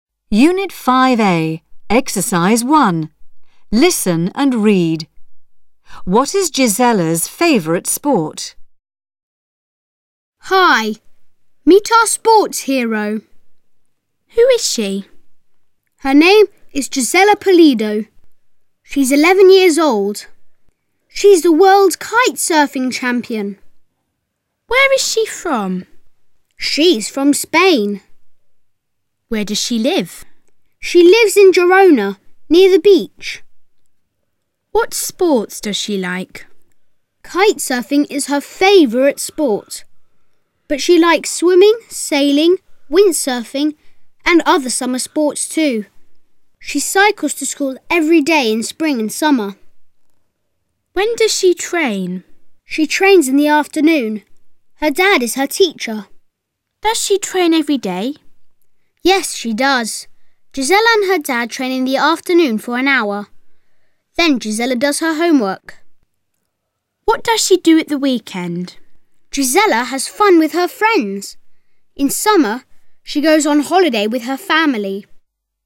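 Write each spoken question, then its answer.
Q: What is Gisella's favourite sport?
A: Kite surfing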